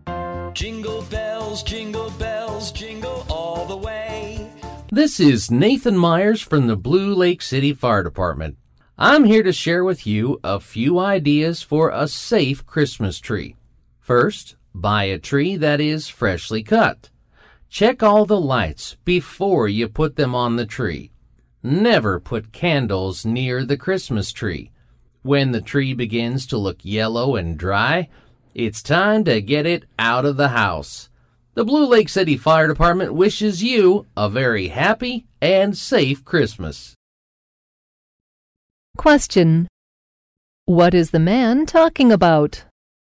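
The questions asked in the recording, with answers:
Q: What is the man talking about?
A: How to keep Christmas trees safe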